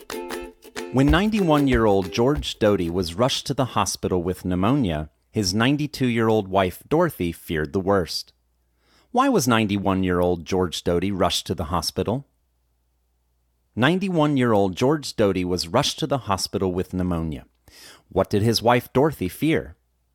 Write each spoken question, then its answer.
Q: Why was 91-year-old George Doty rushed to the hospital?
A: 91-year-old George Doty was rushed to the hospital with pneumonia.

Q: What did his wife, Dorothy, fear?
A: His wife, Dorothy, feared the worst.